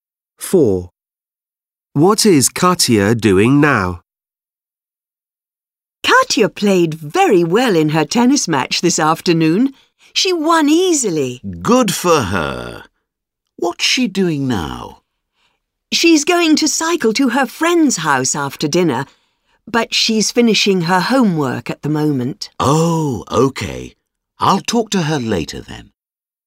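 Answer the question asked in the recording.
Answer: Finishing her homework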